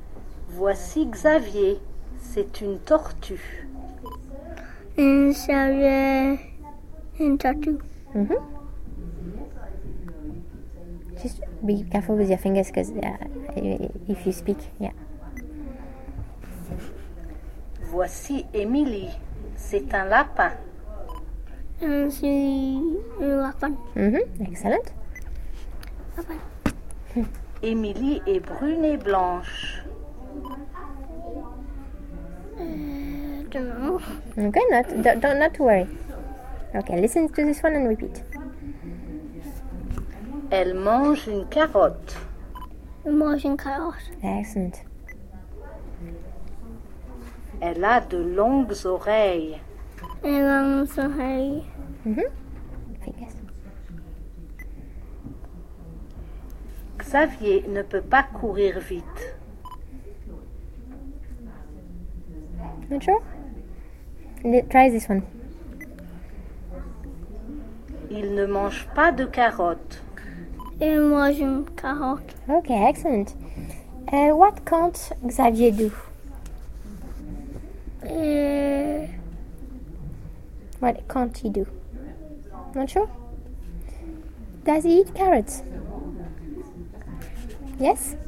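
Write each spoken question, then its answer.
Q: What can't Xavier do?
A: Run fast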